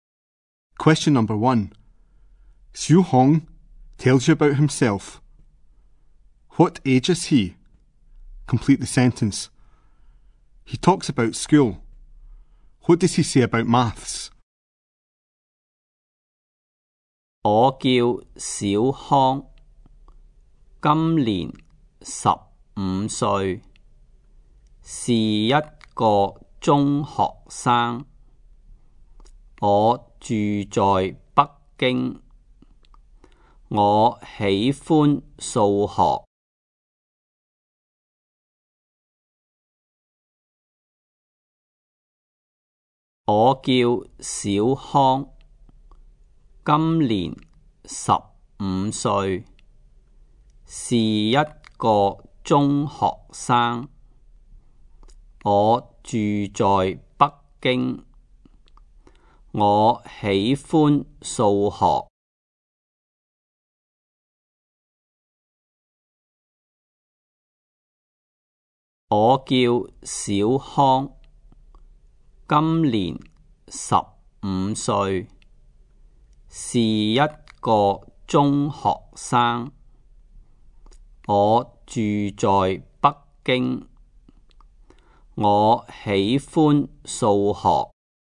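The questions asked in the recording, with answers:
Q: What age is he?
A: 15

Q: What does he say about maths?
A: He likes maths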